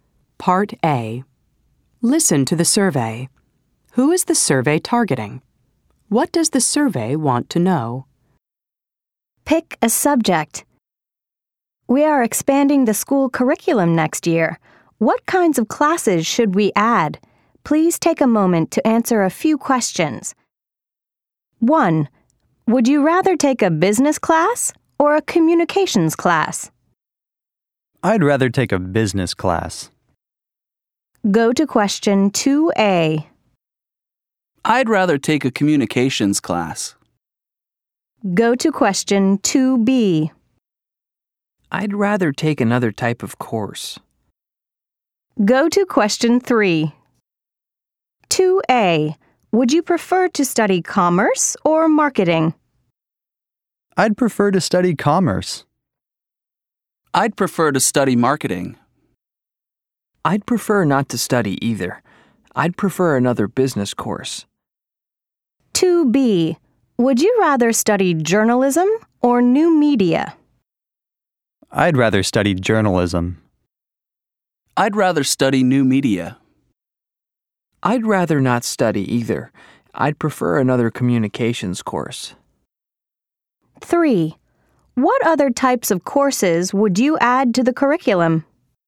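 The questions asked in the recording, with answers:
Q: What does the survey want to know?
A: What kinds of classes to add to the school curriculum next year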